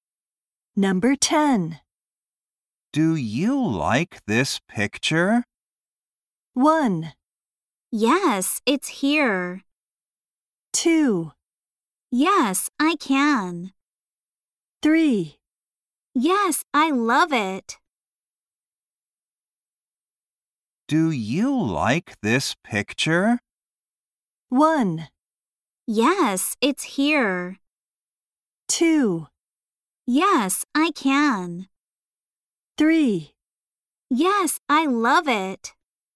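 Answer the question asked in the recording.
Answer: 3: Yes, I love it.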